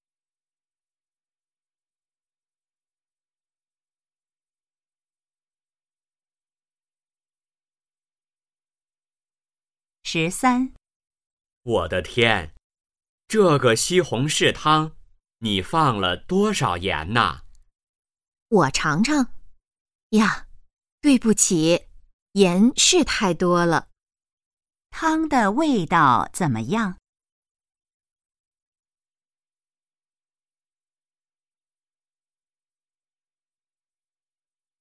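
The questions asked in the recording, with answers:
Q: 汤的味道怎么样?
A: 太咸了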